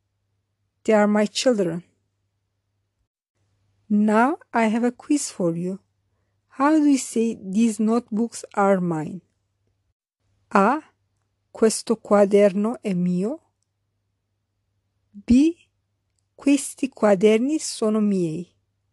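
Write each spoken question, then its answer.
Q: How do we say these notebooks are mine?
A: B: Questi quaderni sono miei.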